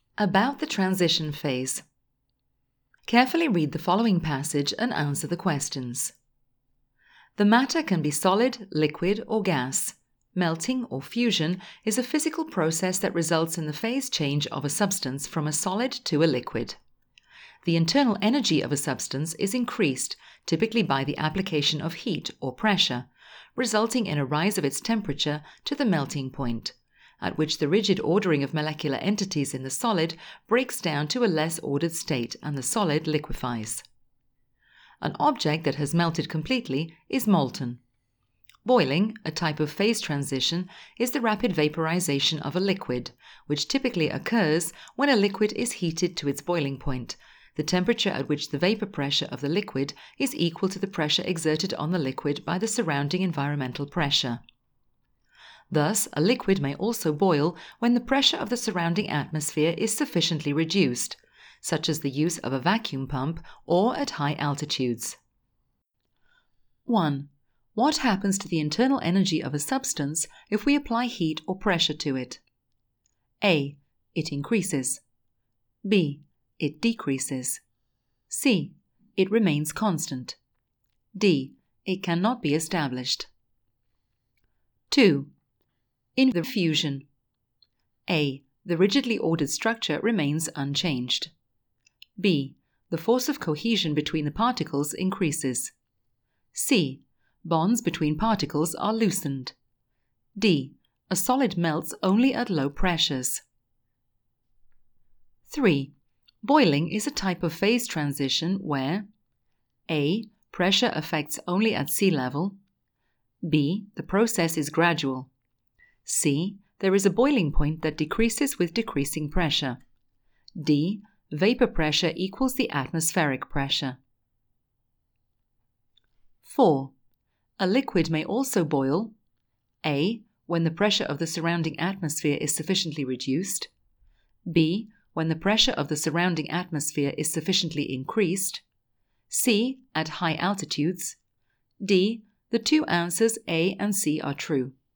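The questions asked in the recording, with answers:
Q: What happens to the internal energy of a substance if we apply heat or pressure to it?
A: A: It increases.

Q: In the fusion,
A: C: Bonds between particles are loosened.

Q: A liquid may also boil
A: D: The two answers A and C are true.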